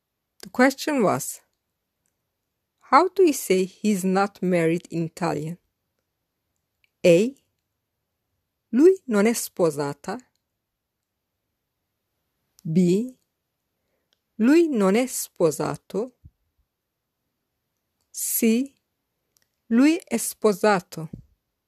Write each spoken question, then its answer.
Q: how do you say he's not married in Italian?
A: The correct answer is B. Lui non è sposato.